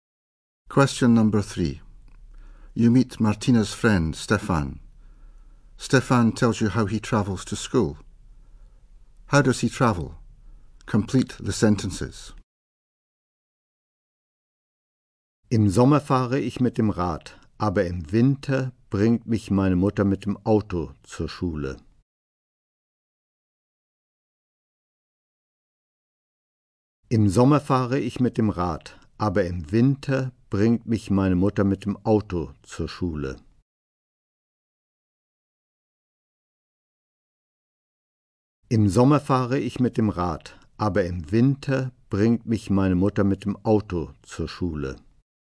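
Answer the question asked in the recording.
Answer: By bike in summer, by car (his mother takes him) in winter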